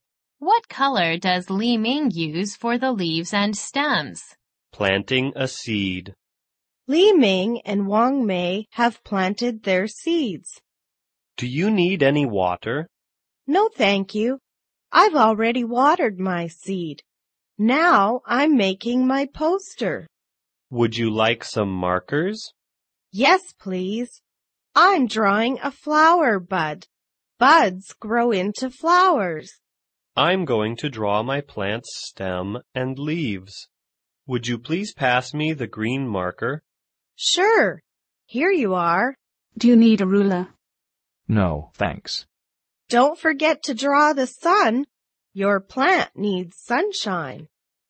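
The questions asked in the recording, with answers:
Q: What color does Li Ming use for the leaves and stems?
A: Green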